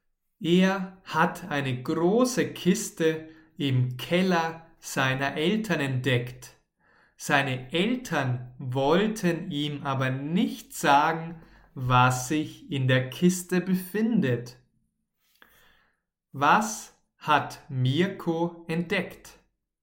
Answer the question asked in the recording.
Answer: Eine große Kiste. Er hat eine große Kiste entdeckt.